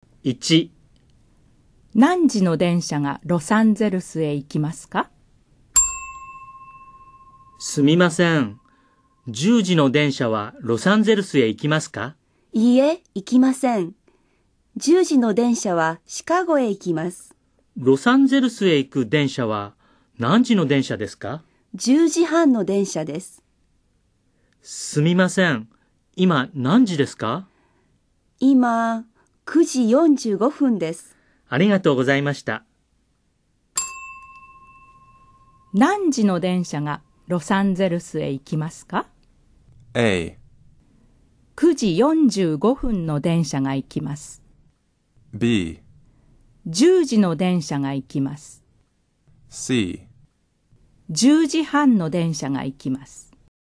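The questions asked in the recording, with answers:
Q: 何時の電車がロサンゼルスへ行きますか?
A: C: 10時半の電車が行きます。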